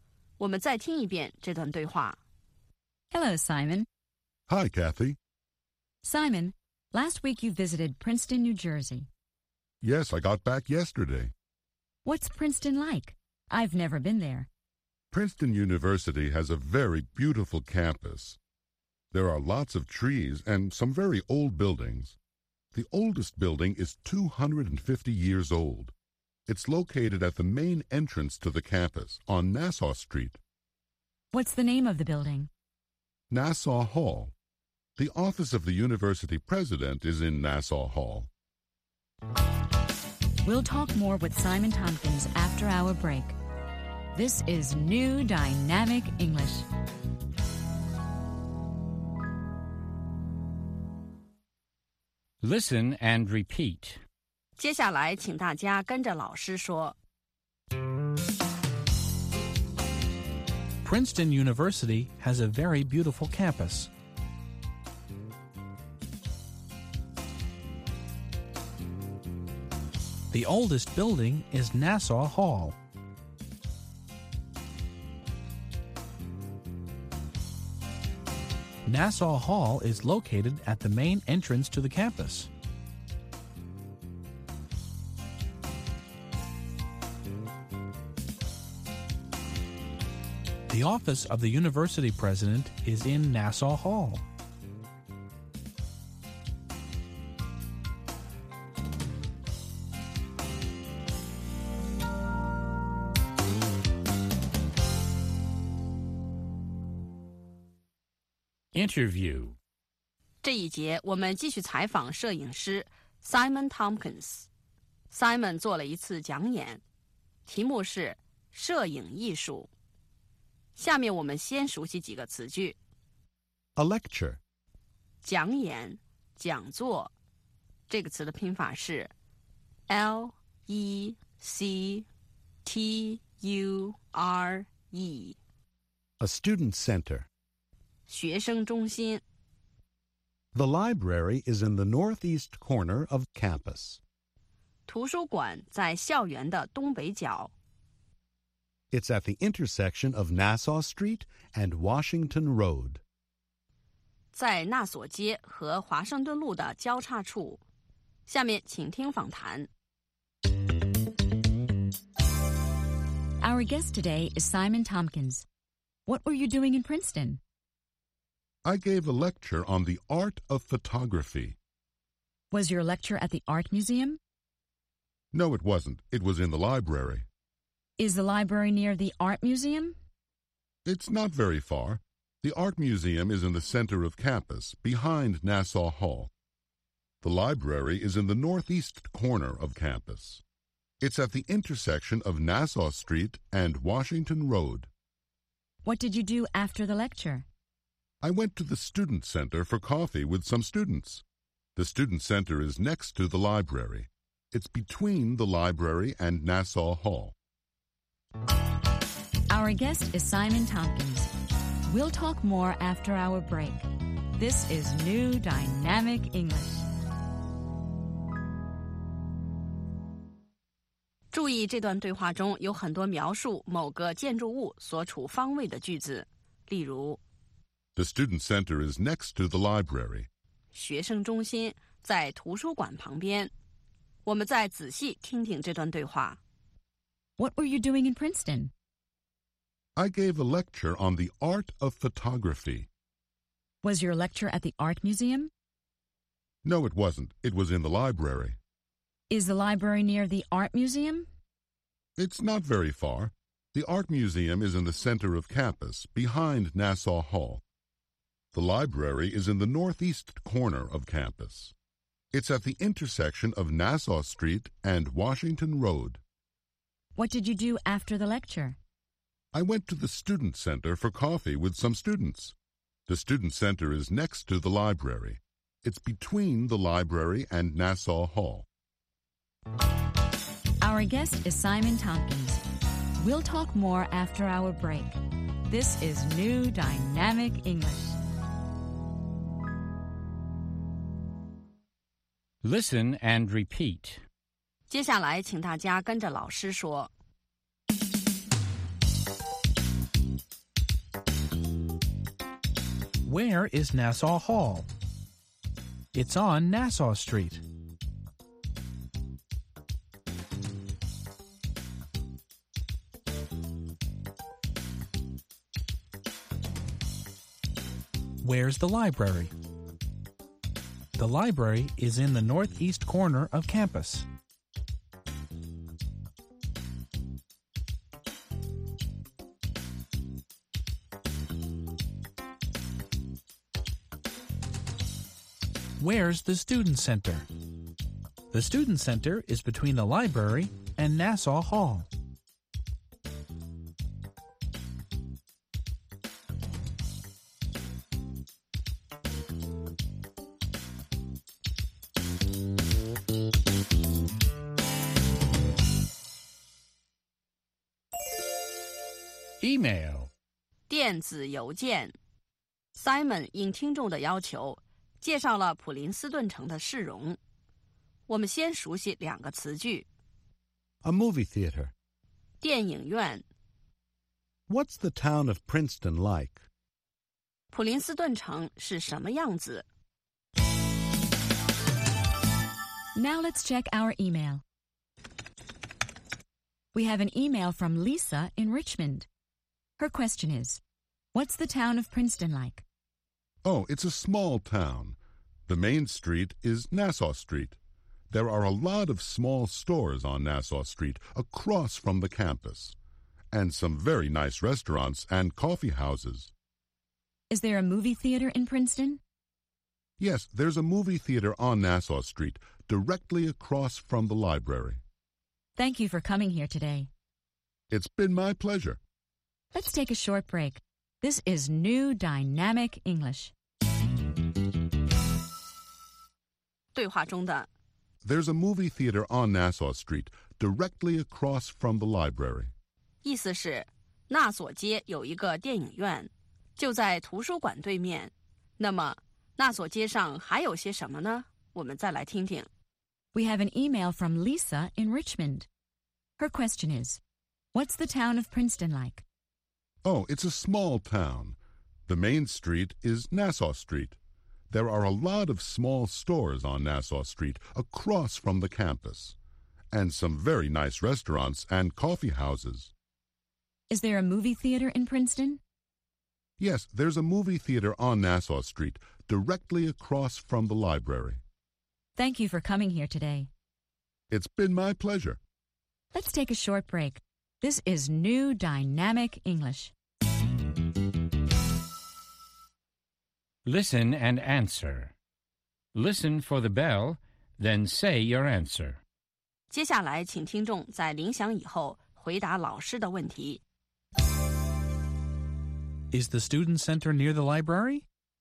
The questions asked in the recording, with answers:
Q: Is the student center near the library?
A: Yes, it is. It's next to the library.